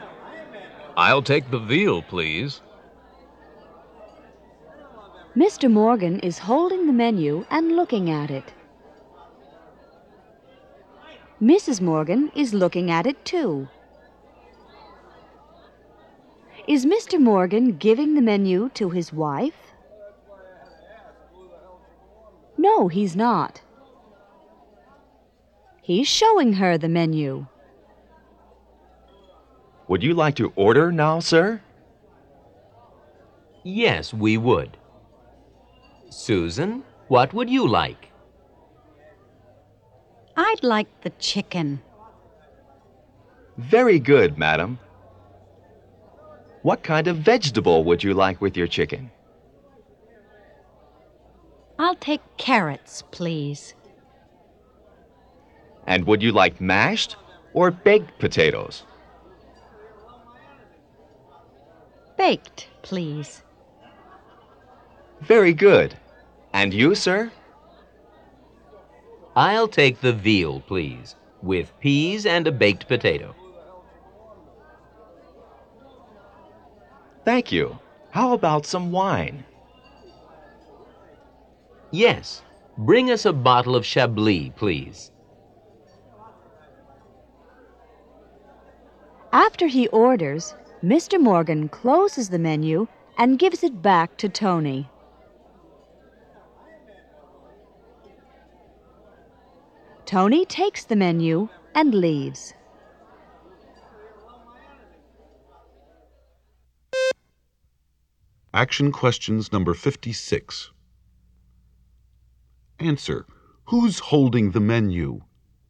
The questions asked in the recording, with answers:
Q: Who's holding the menu?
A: Mr. Morgan is.